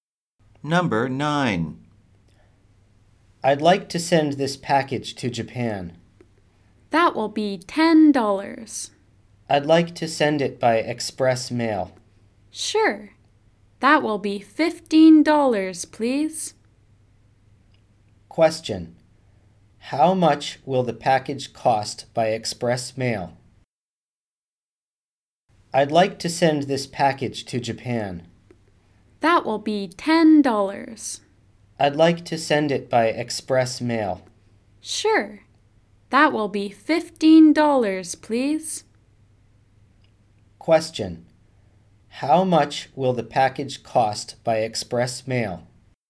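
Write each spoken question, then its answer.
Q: How much will the package cost by express mail?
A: $15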